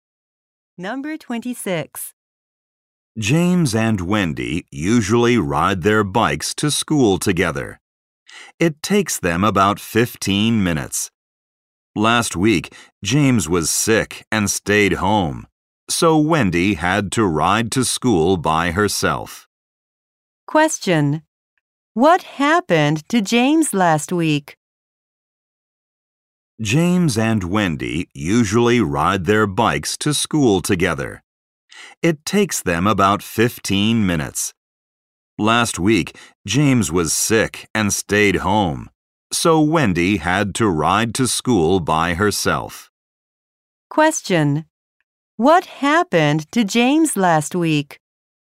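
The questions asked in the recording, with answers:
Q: Question. What happened to James last week?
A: He was sick and stayed home.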